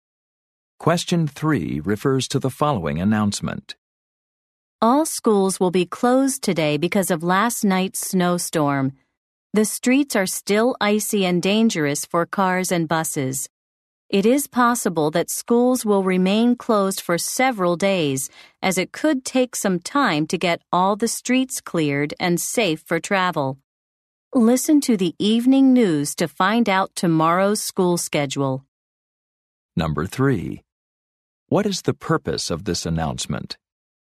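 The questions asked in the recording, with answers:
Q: What is the purpose of this announcement?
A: To announce that schools are closed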